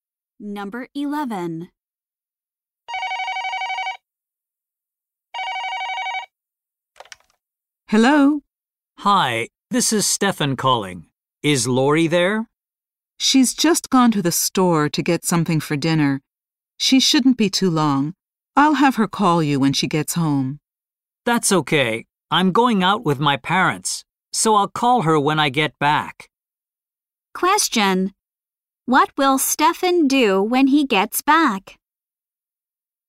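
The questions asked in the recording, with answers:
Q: What will Stefan do when he gets back?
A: Call Lori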